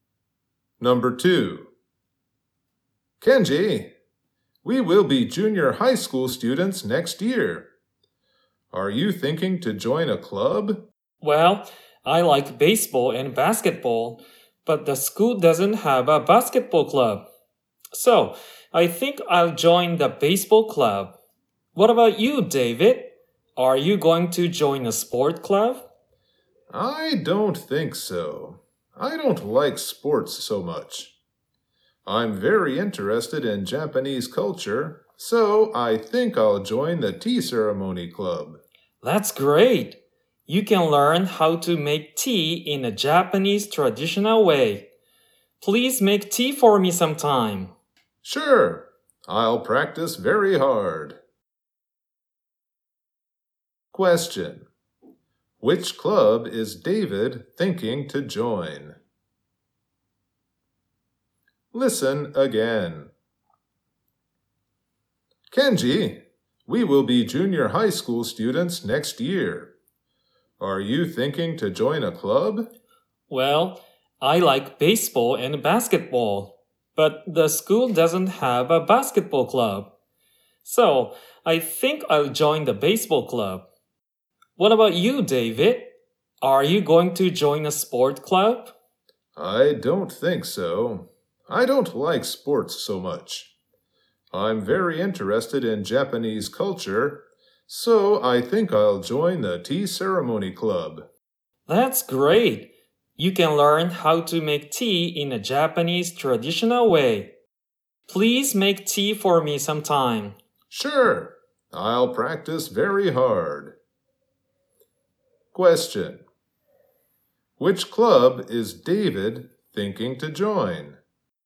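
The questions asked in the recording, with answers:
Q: Which club is David thinking to join?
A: The tea ceremony club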